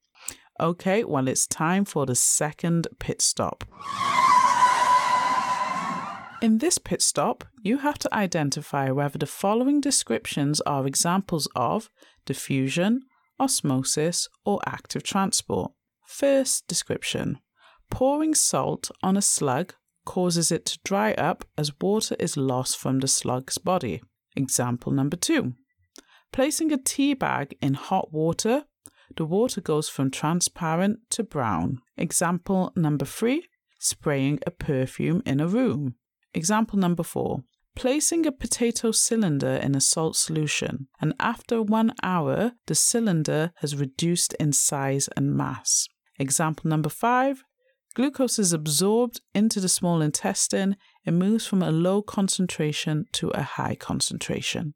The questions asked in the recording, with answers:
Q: Example number five: glucose is absorbed into the small intestine.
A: That is active transport.